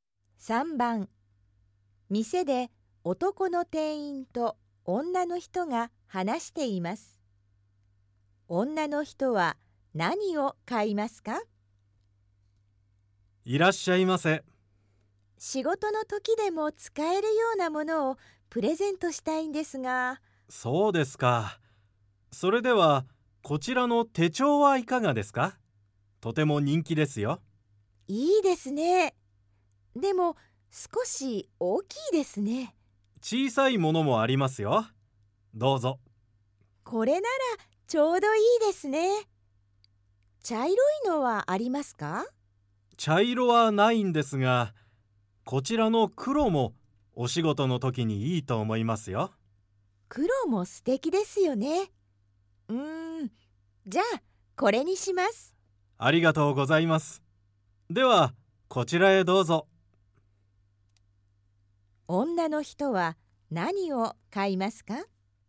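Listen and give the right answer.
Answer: 小さい黒の手帳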